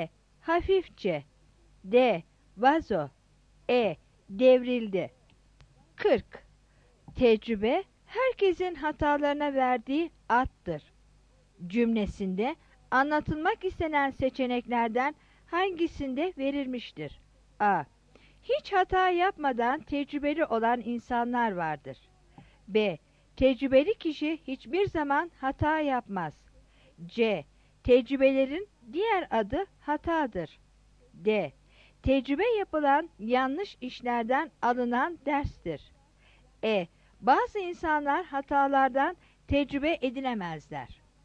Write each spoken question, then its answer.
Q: Cümlesinde anlatılmak istenen seçeneklerden hangisinde verilmiştir?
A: 40 D